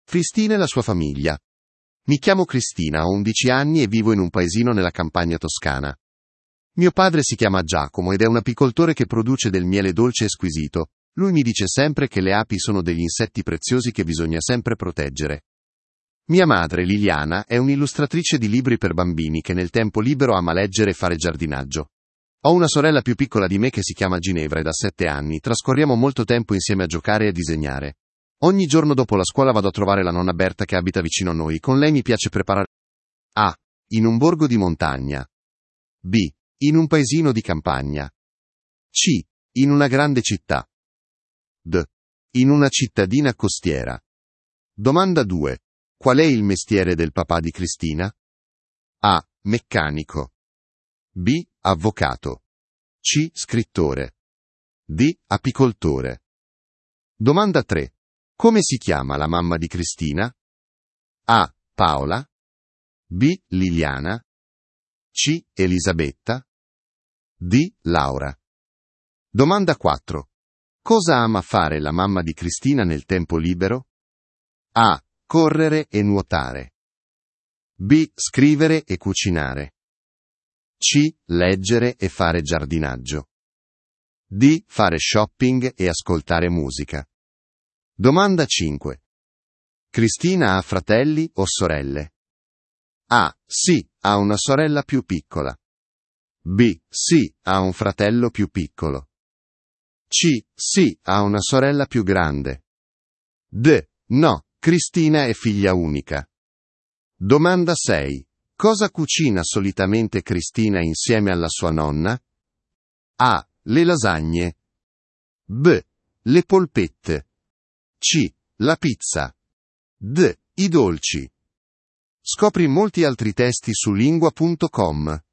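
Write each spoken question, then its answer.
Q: Qual è il mestiere del papà di Cristina?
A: D: apicoltore

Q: Come si chiama la mamma di Cristina?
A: B: Liliana

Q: Cosa ama fare la mamma di Cristina nel tempo libero?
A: C: leggere e fare giardinaggio

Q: Cristina ha fratelli o sorelle?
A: A: sì, ha una sorella più piccola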